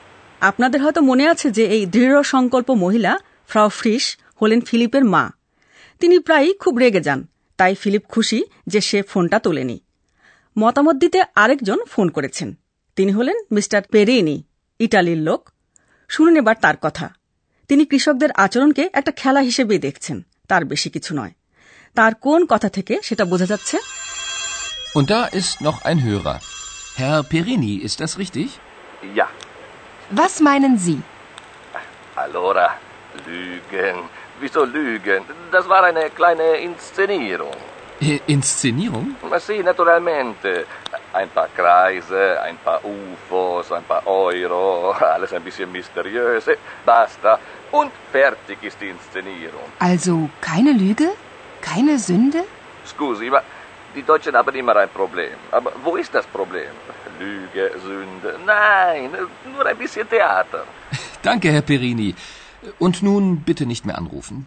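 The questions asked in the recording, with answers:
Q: তার কোন কথা থেকে সেটা বোঝা যাচ্ছে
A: "Das war eine kleine Inszenierung" / "nur ein bisschen Theater" (এটা একটা ছোট মঞ্চায়ন, একটু theatre মাত্র)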